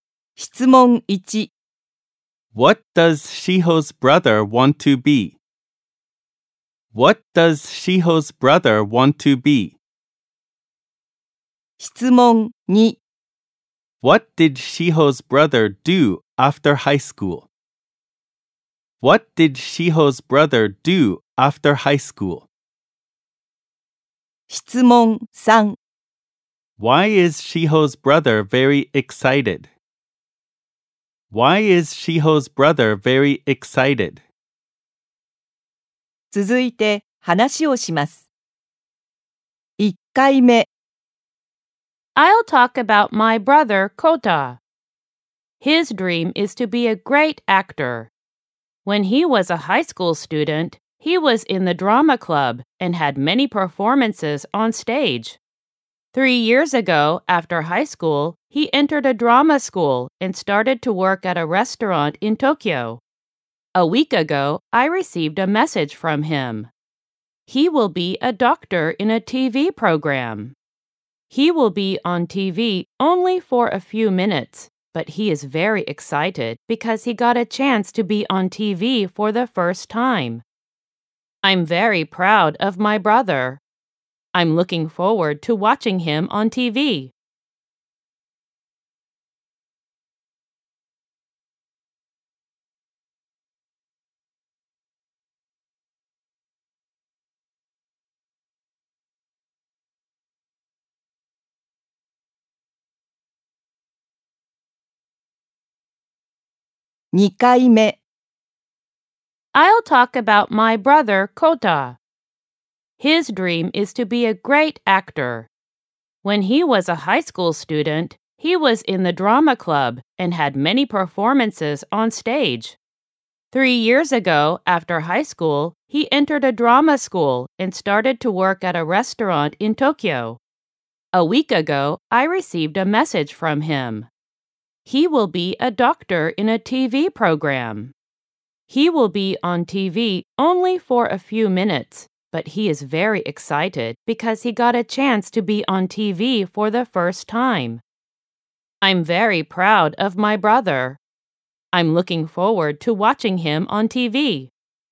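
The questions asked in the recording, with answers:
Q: What does Shiho's brother want to be?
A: A great actor

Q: What did Shiho's brother do after high school?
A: He entered a drama school and started to work at a restaurant in Tokyo

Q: Why is Shiho's brother very excited?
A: Because he got a chance to be on TV for the first time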